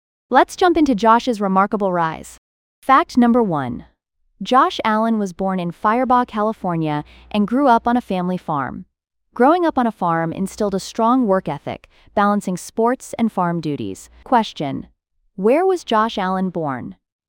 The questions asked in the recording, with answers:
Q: where was Josh Allen born?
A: Firebaugh, California.